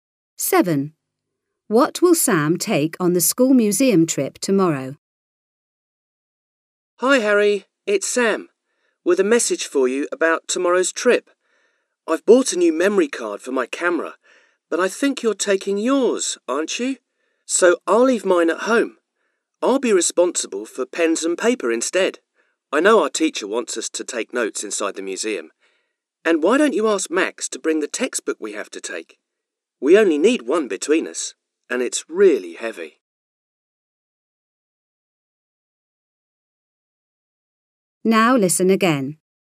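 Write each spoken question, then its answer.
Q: What will Sam take on the school museum trip tomorrow?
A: Pens and paper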